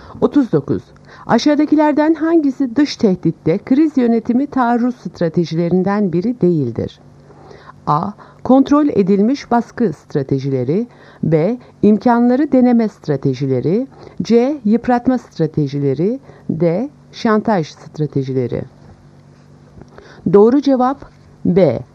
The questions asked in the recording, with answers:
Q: Aşağıdakilerden hangisi dış tehditte kriz yönetimi taarruz stratejilerinden biri değildir?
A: Doğru cevap B. İmkanları deneme stratejileri.